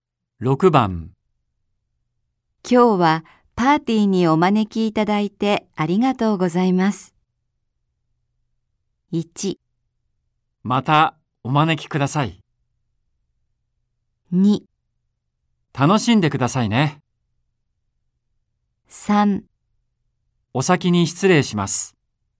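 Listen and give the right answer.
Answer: 2: 楽しんでくださいね。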